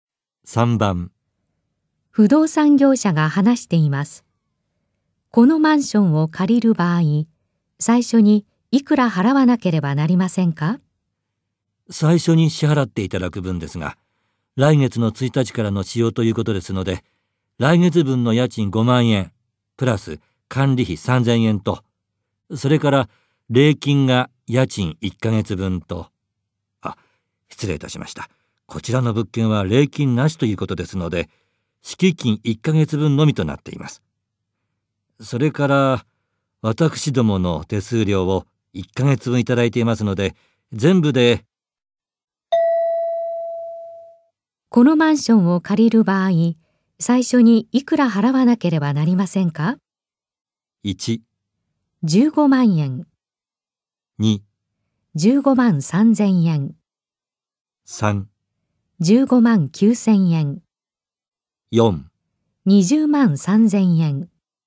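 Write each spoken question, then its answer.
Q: このマンションを借りる場合、最初にいくら払わなければなりませんか?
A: 2: 15万3千円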